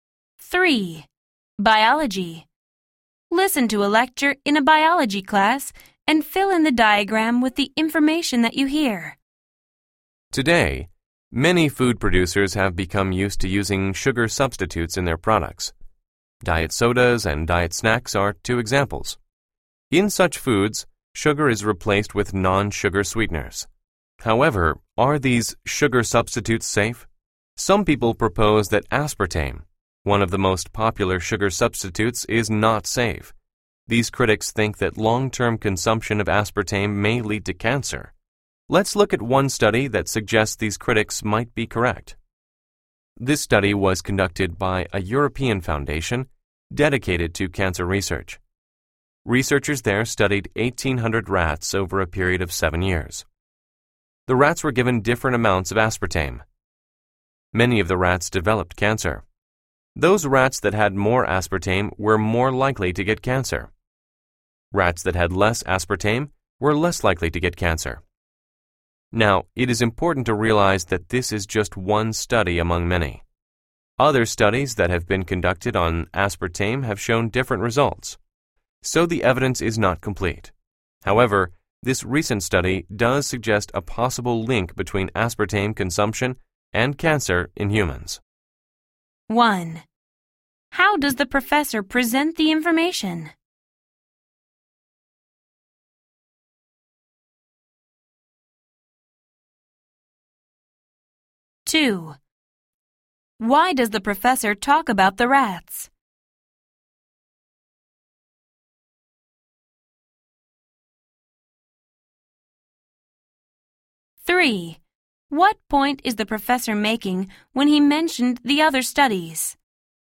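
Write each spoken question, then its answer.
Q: Why does the professor talk about the rats?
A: They were the subjects of a study suggesting more aspartame makes cancer more likely

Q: What point is the professor making when he mentioned the other studies?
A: The evidence is not complete; other studies showed different results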